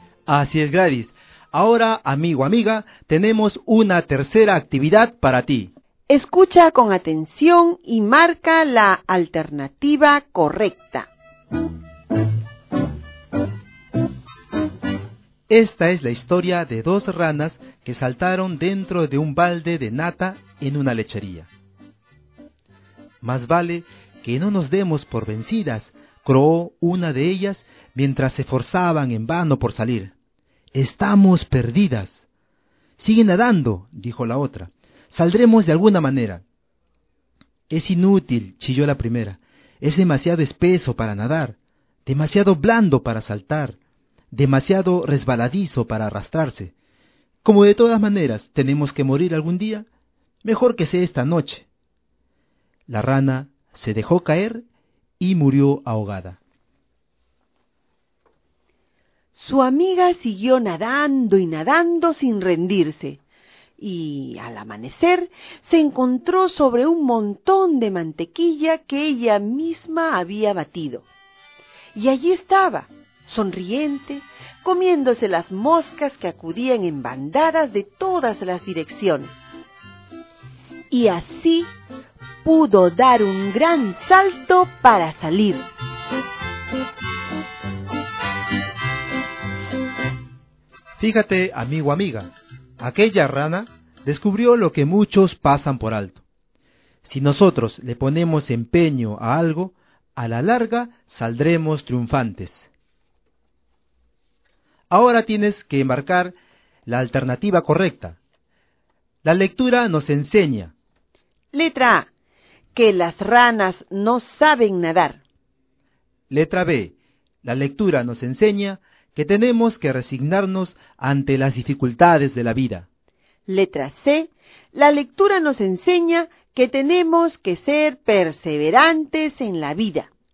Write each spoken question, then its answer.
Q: La lectura nos enseña.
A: La lectura nos enseña que así en la vida como en la oración tenemos que ser persistentes, tenemos que perseverar.